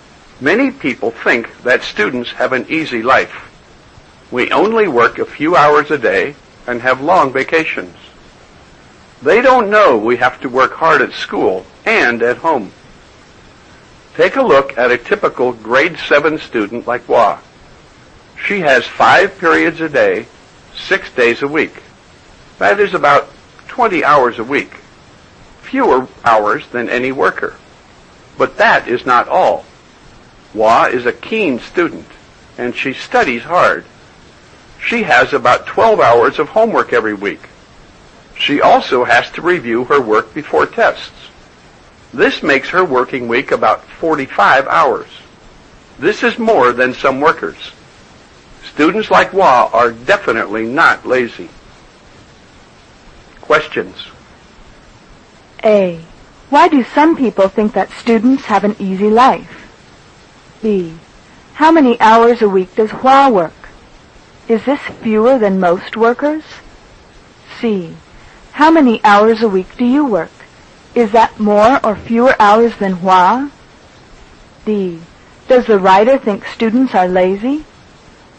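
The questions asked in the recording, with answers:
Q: Why do some people think that students have an easy life?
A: Because they only work a few hours a day and have long vacations

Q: How many hours a week does Hua work?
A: About 45 hours

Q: Does the writer think students are lazy?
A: No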